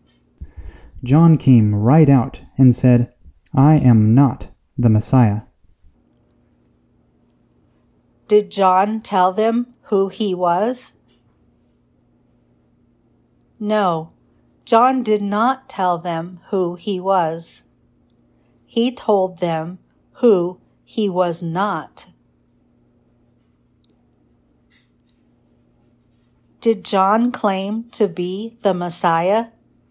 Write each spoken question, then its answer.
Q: Did John claim to be the Messiah?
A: No, John said, I am not the Messiah.